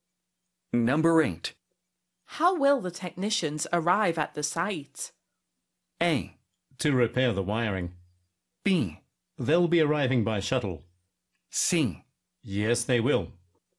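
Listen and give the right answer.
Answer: B: They'll be arriving by shuttle.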